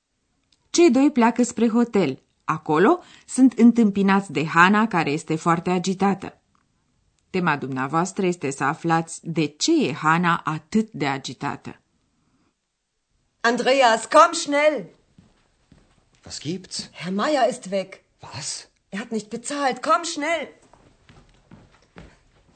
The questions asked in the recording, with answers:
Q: Tema dumneavoastră este să aflați de ce e Hana atât de agitată.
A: Domnul Maier a plecat de la hotel fără să plătească.